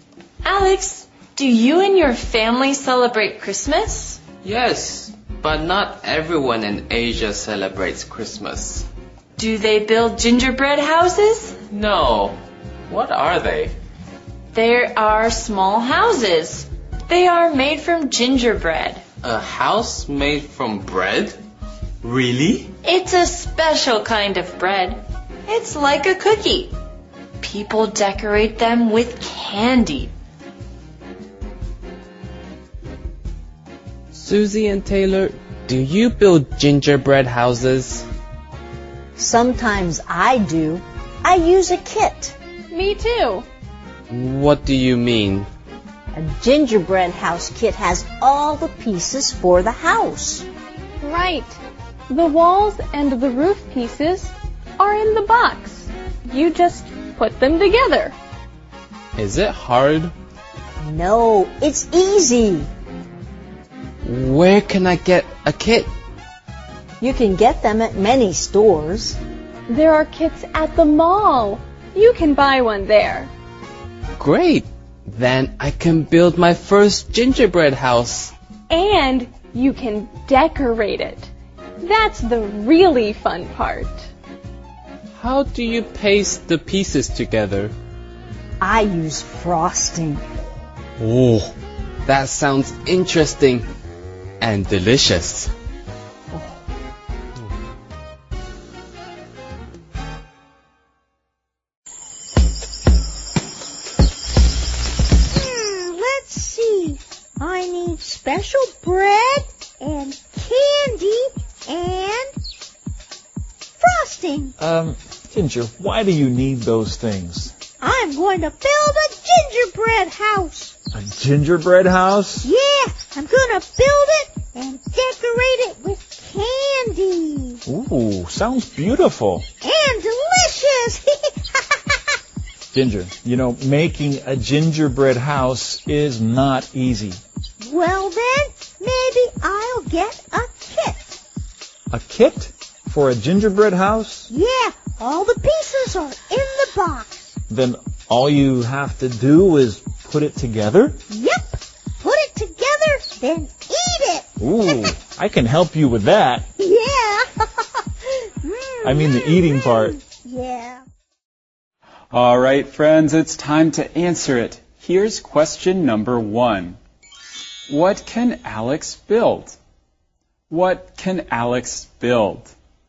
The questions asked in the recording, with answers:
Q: What can Alex build?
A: He can build a gingerbread house.